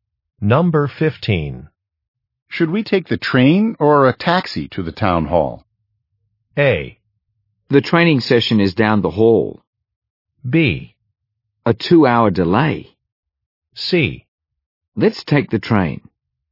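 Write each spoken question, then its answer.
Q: Should we take the train or a taxi to the town hall?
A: C: Let's take the train.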